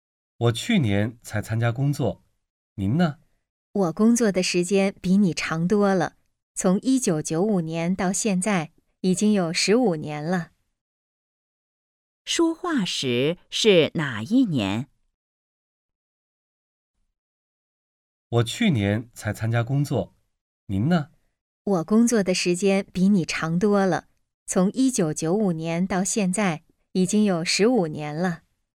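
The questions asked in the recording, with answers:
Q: 说话时是哪一年?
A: 2010年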